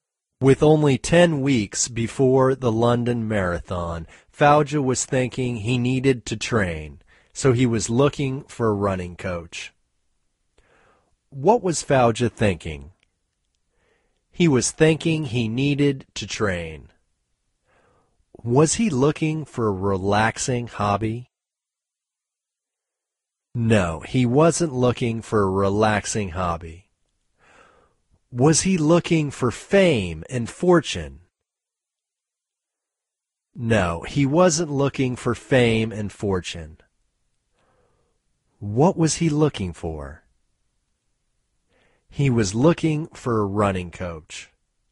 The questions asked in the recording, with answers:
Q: What was Fauja thinking?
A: He was thinking he needed to train.

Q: Was he looking for a relaxing hobby?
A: No, he wasn't looking for a relaxing hobby.

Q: What was he looking for?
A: He was looking for a running coach.